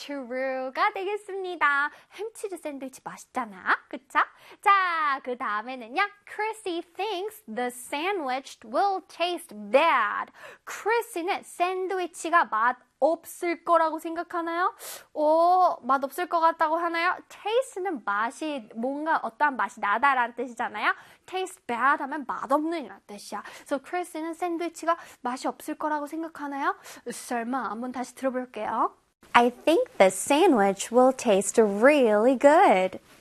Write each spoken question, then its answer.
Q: Chrissy thinks the sandwich will taste bad.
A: 맞습니다. False 되겠어요.